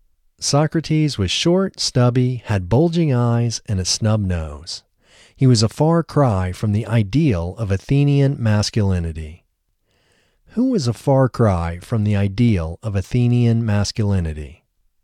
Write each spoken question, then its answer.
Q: Who was a far cry from the ideal of Athenian masculinity?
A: Socrates was a far cry from the ideal of Athenian masculinity.